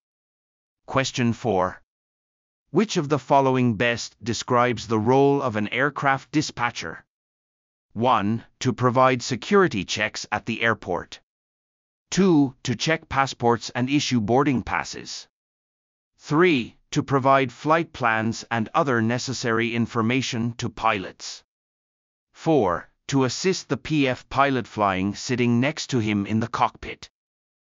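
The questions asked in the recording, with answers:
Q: Which of the following best describes the role of an aircraft dispatcher?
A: 3: To provide flight plans and other necessary information to pilots.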